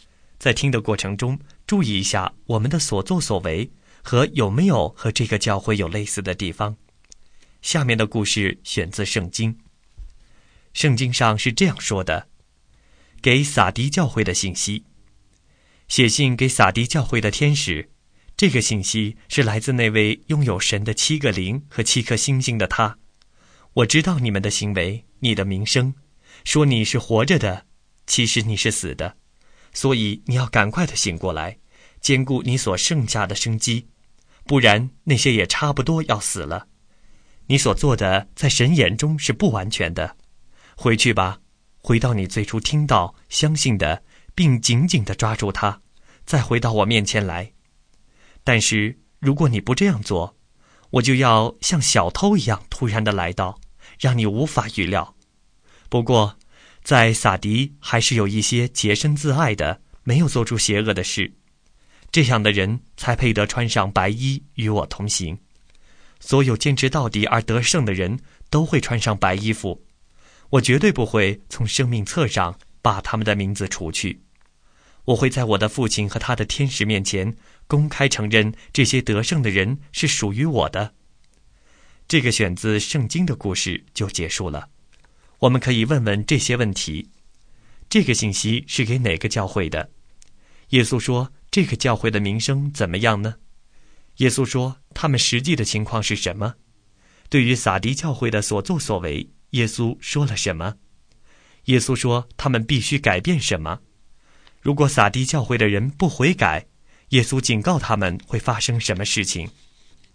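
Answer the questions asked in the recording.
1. 撒迪教会
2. 说他们是活着的
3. 其实是死的
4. 在神眼中是不完全的
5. 赶快醒过来,回到最初听到相信的,并紧紧抓住它
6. 他会像小偷一样突然来到,让他们无法预料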